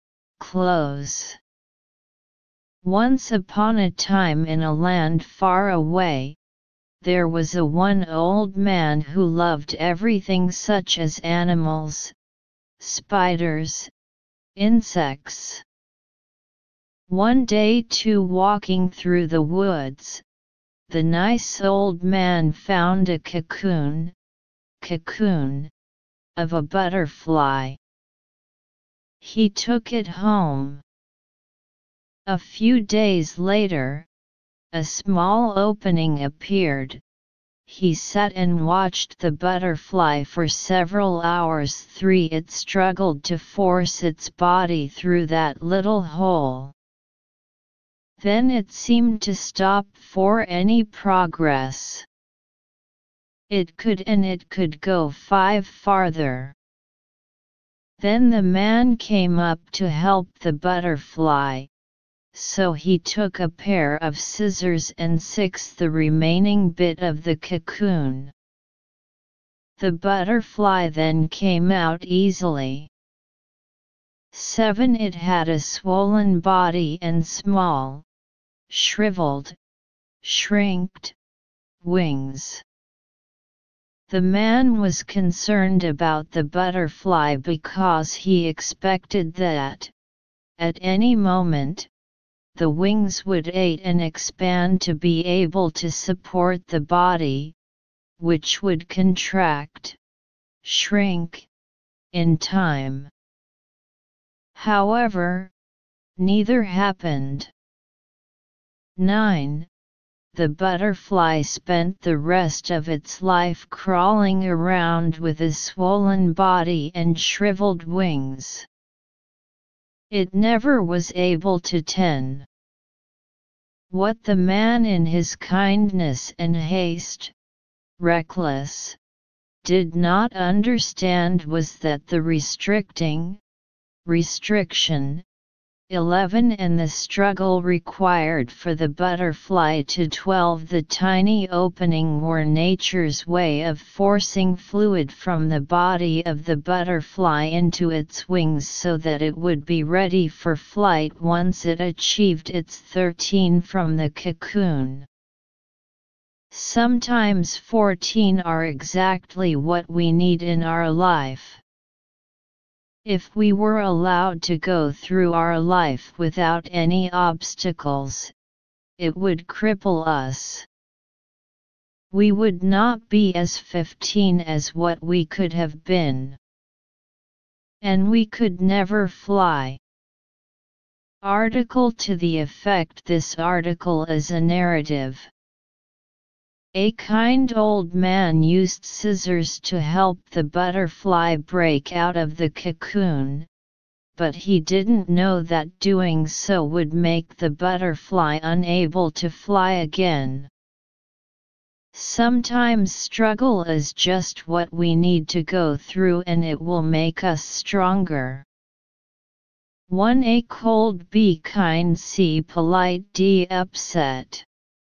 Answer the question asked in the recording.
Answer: Analysis: choose B.